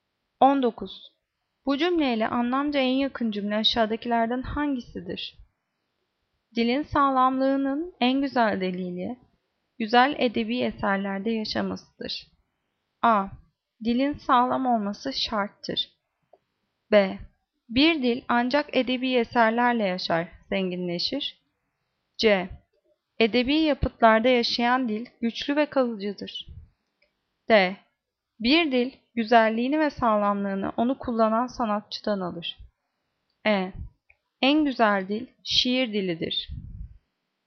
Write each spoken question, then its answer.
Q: Bu cümleyle anlamca en yakın cümle aşağıdakilerden hangisidir?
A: Cevap C. Edebi yapıtlarda yaşayan dil güçlü ve kalıcıdır.